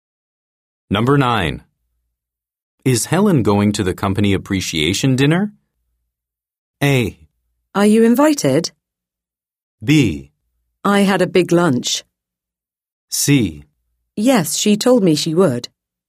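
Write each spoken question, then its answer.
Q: Is Helen going to the company appreciation dinner?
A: C: Yes, she told me she would.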